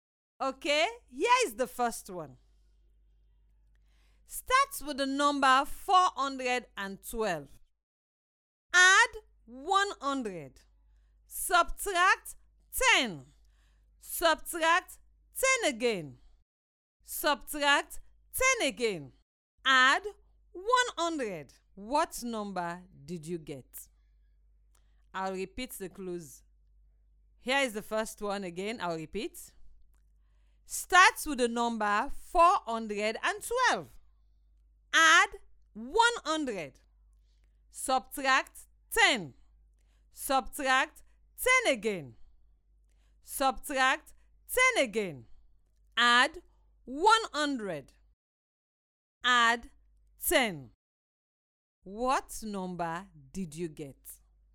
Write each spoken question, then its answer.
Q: What number did you get?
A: Adding 10 gives us 592.